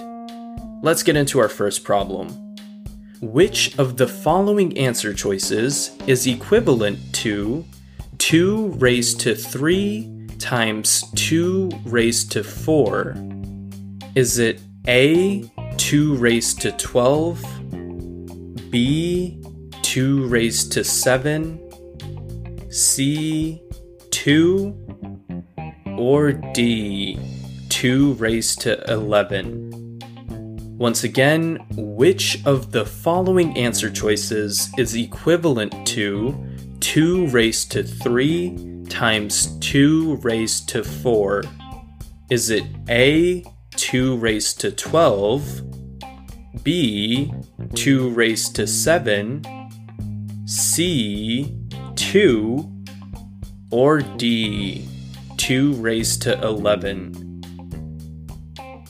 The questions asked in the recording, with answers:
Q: Which of the following answer choices is equivalent to 2 raised to 3 times 2 raised to 4?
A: So B, 2 raised to 7, is correct.